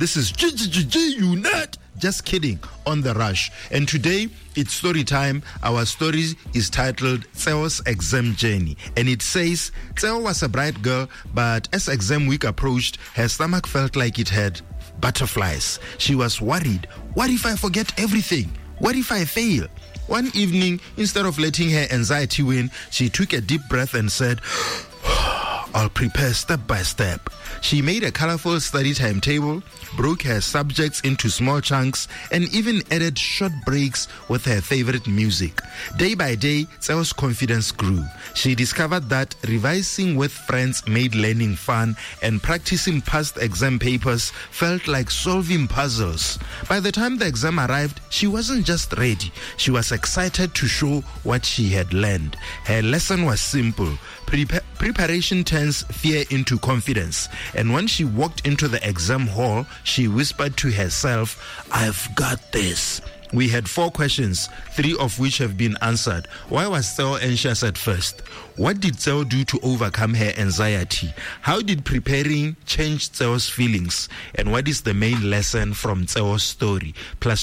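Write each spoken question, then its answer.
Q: Why was Tseo anxious at first?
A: She was worried she would fail her exams and forget what she had studied.

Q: What did Tseo do to overcome her anxiety?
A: She made a study timetable, revised step by step and practised with friends.

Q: How did preparing change Tseo's feelings?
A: It turned her fear into confidence; she felt calm and even excited.

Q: And what is the main lesson from Tseo's story?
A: Preparation turns fear into confidence.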